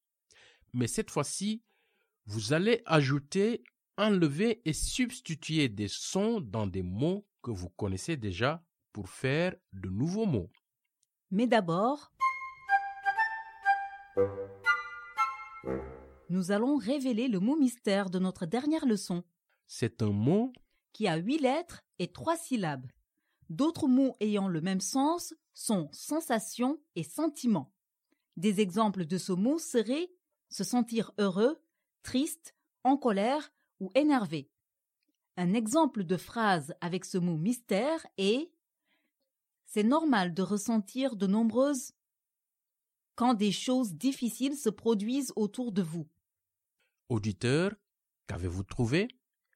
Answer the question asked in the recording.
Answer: Le mot mystère d'aujourd'hui est « émotion ».